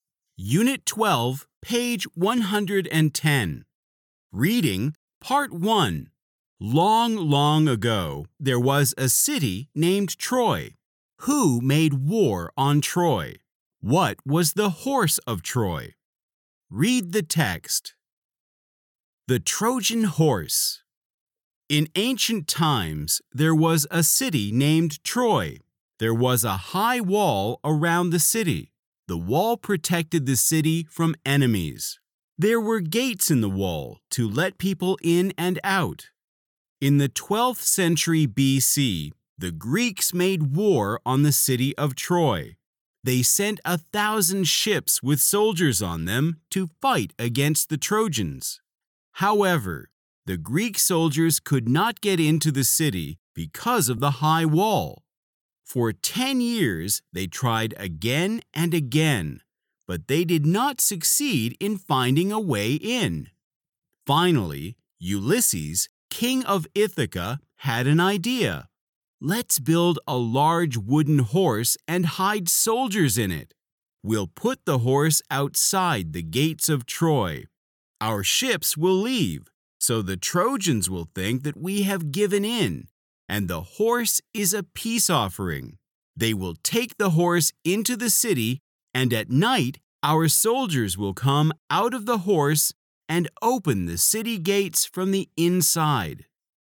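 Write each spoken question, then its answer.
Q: Who made war on Troy?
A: The Greeks

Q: What was the horse of Troy?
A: A large wooden horse with Greek soldiers hidden inside it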